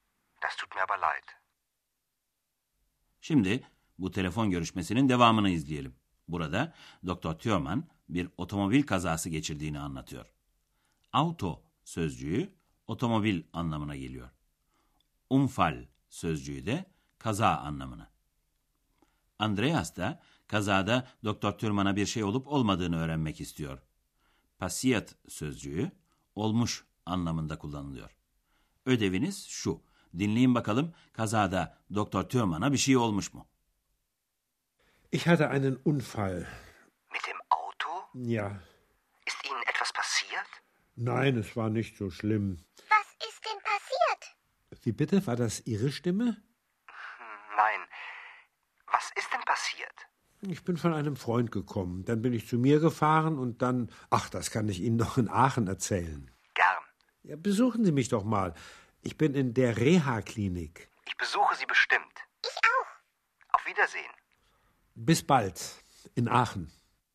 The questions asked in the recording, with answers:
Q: Dinleyin bakalım kazada Doktor Türman'a bir şey olmuş mu?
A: Neyse ki Doktor Tüyoman'a pek bir şey olmamış.